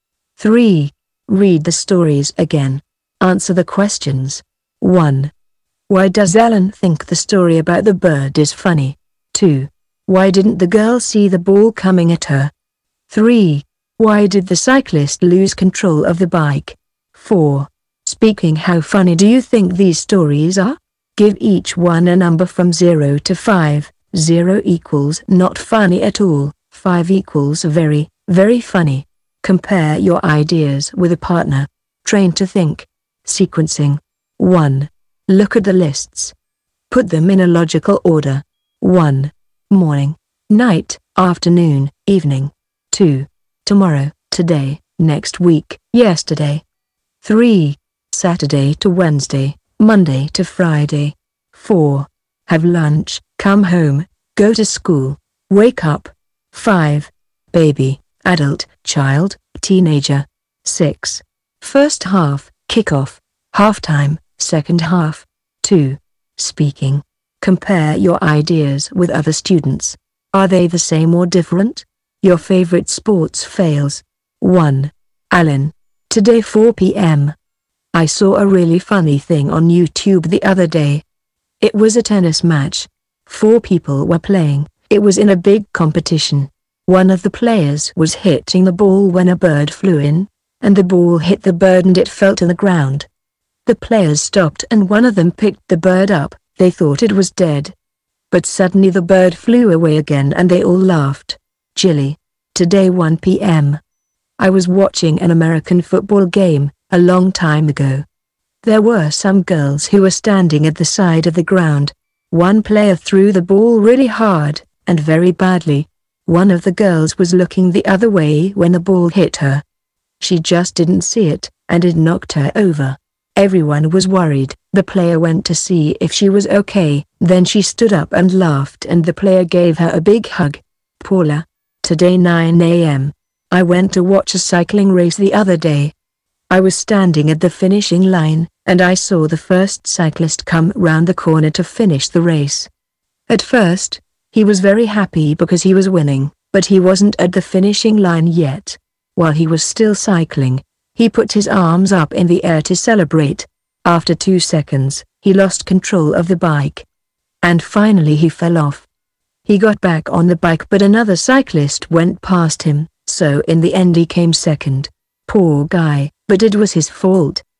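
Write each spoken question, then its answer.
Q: Why didn't the girl see the ball coming at her?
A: She was looking the other way

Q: Why did the cyclist lose control of the bike?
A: He put his arms up in the air to celebrate before he reached the finishing line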